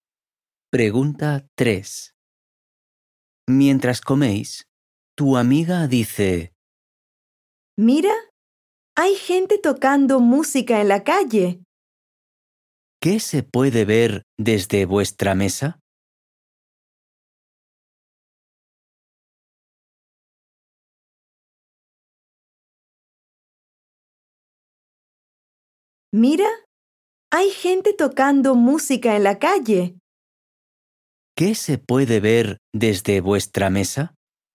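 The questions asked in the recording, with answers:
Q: ¿Qué se puede ver desde vuestra mesa?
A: Gente tocando música en la calle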